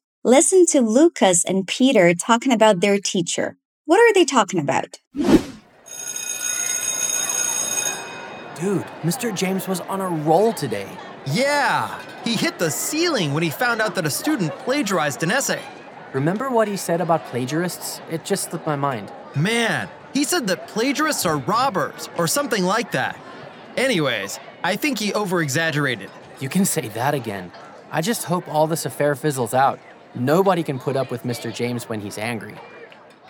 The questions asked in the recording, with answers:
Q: What are they talking about?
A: It seems like Mr. James, their teacher, was on a roll today. He was angry that a student cheated on an essay.